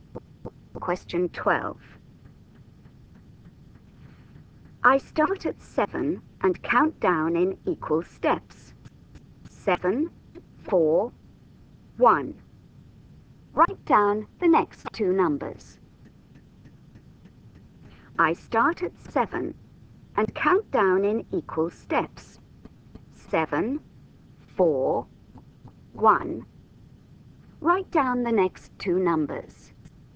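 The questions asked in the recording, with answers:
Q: 7, 4, 1. Write down the next two numbers.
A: -2, -5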